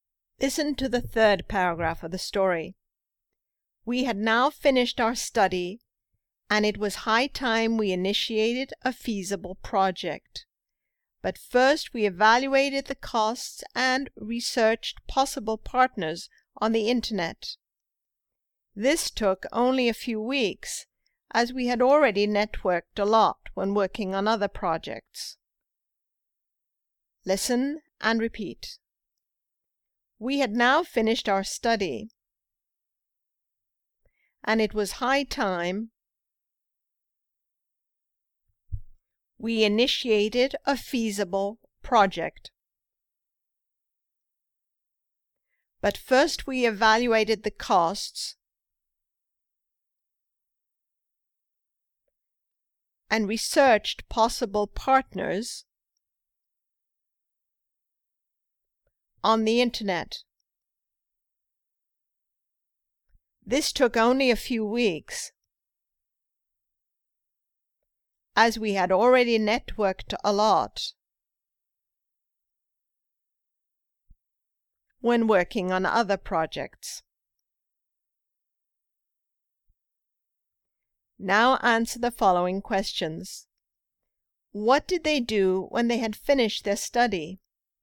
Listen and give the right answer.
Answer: They initiated a feasible project.